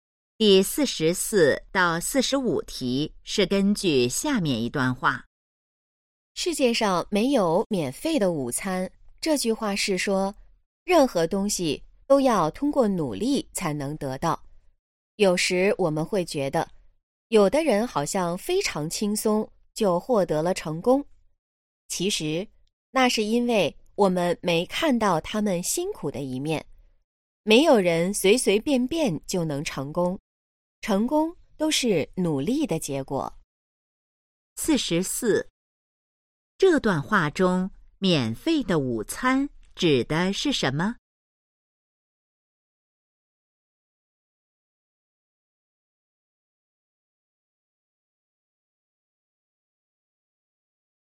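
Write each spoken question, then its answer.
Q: 这段话中,免费的午餐指的是什么?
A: 不通过努力就能得到的东西

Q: 这段话主要想告诉我们什么?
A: 成功要靠努力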